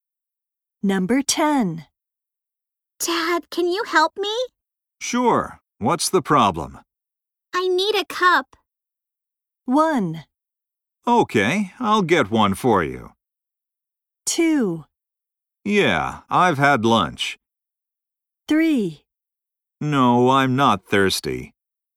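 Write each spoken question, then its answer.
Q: I need a cup.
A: 1: Okay, I'll get one for you.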